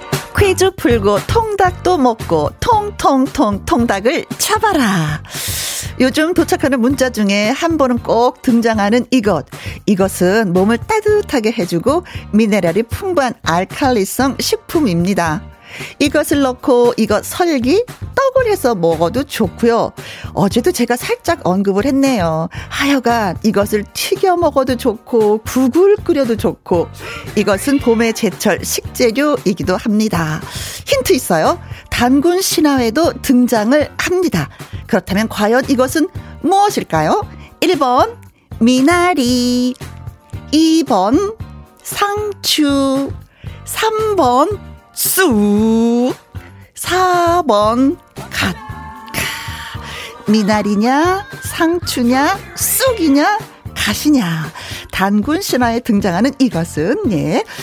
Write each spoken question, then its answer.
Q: 그렇다면 과연 이것은 무엇일까요?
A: 정답은 쑥!